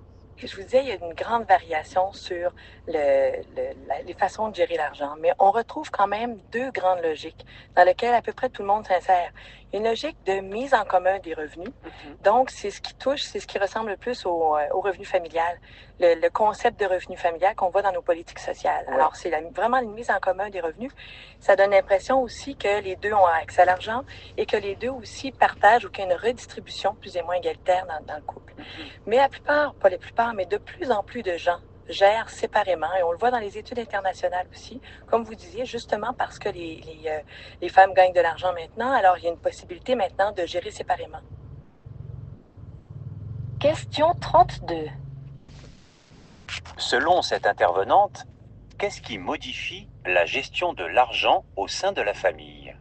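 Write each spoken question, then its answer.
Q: Selon cette intervenante, qu'est-ce qui modifie la gestion de l'argent au sein de la famille?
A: Le fait que les femmes gagnent maintenant de l'argent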